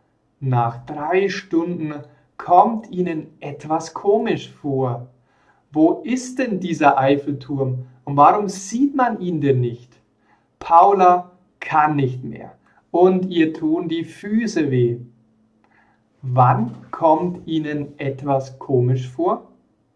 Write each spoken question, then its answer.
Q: Wann kommt Ihnen etwas komisch vor?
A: Nach drei Stunden.